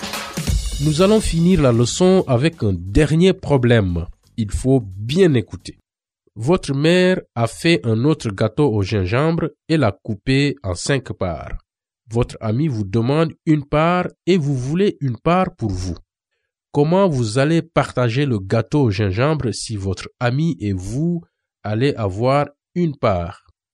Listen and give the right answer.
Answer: On a mangé 2/5 du gâteau.